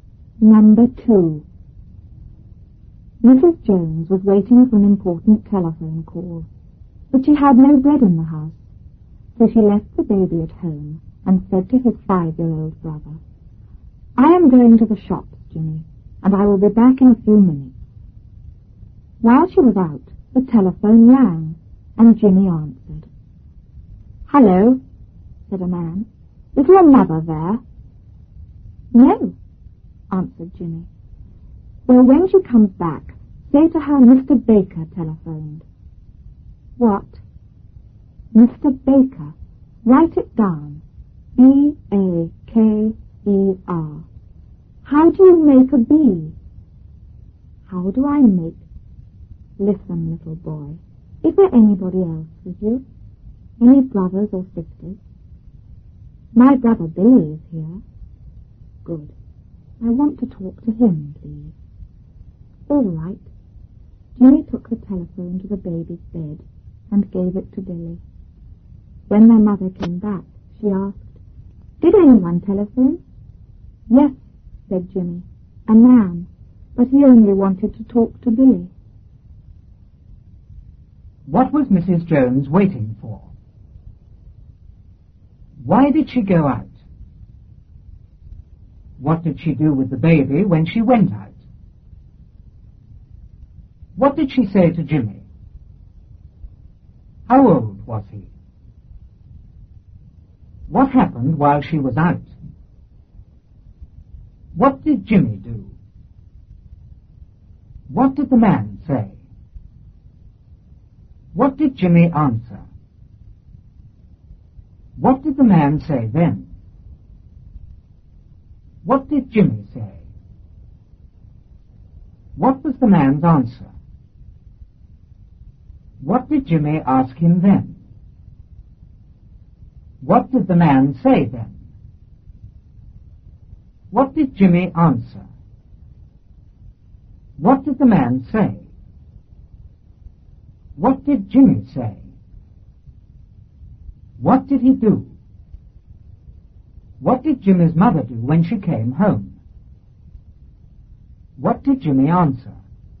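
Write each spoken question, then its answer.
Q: What was Mrs. Jones waiting for?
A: An important telephone call

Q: Why did she go out?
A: She had no bread in the house

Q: What did she do with the baby when she went out?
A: She left him at home

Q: What did she say to Jimmy?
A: I am going to the shops, Jimmy, and I will be back in a few minutes.

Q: How old was he?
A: Five years old

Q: What happened while she was out?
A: The telephone rang

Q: What did Jimmy do?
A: He answered the telephone

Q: What did Jimmy's mother do when she came home?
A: She asked if anyone had telephoned

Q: What did Jimmy answer?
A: A man, but he only wanted to talk to Billy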